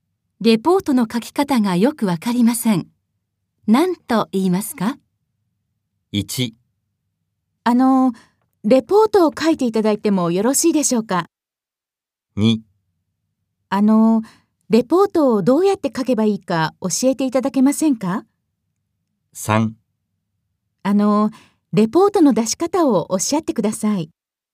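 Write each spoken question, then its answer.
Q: レポートの書き方がよくわかりません。何と言いますか?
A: 2: レポートをどうやって書けばいいか教えていただけませんか?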